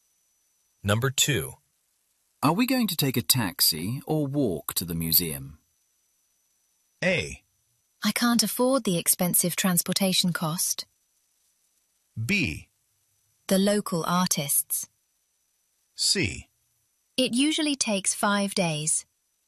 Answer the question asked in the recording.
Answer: 그 말은 즉, 택시를 타기는 부담스럽다라는 그런 식의 우회적인 답변이 될 수 있겠습니다. 정답이 되겠고요.